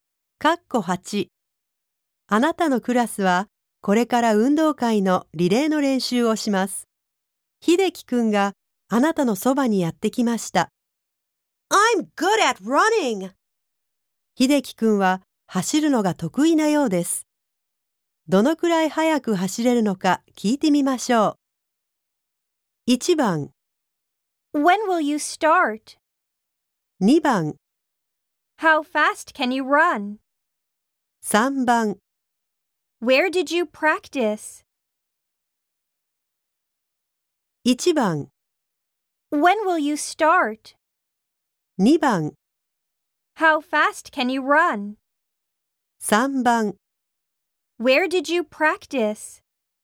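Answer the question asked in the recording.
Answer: 2: How fast can you run?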